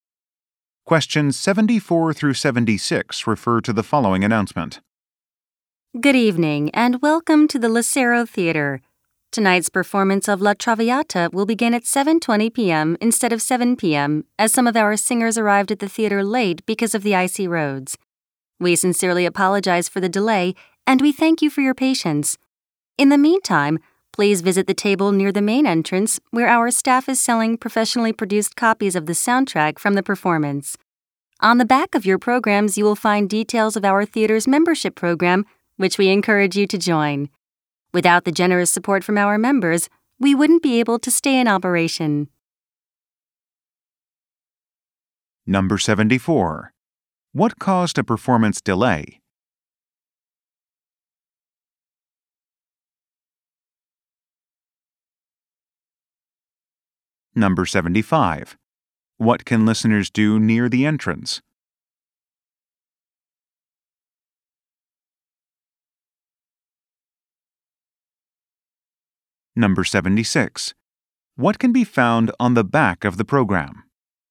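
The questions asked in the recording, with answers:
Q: What caused a performance delay?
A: Singers arrived late because of icy roads

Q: What can listeners do near the entrance?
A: Buy the soundtrack

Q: What can be found on the back of the program?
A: Membership program details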